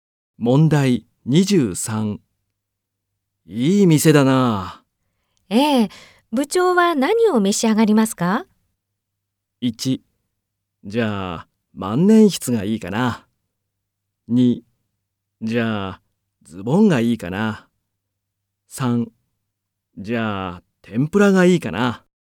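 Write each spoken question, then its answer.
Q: いい店だな。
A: 2: じゃあ、天ぷらがいいかな。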